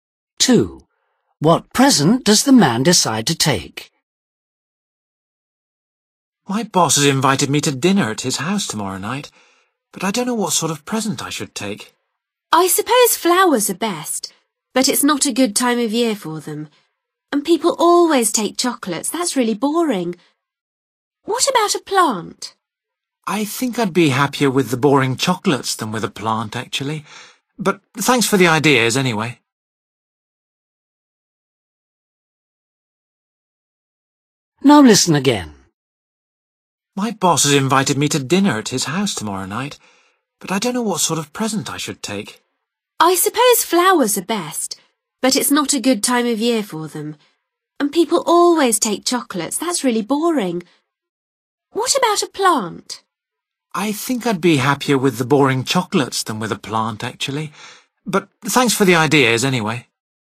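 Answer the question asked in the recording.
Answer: chocolates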